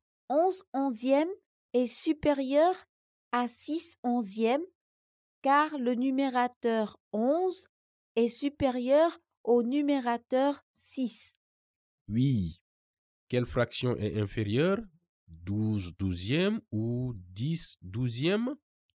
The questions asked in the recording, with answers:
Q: Quelle fraction est inférieure?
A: 10 douzième est inférieur à 12 douzième car le numérateur 10 est inférieur au numérateur 12.